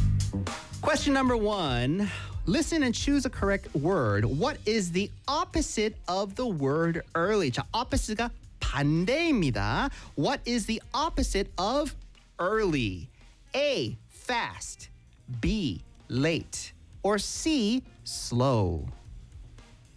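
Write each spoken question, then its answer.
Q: What is the opposite of the word early?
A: B: late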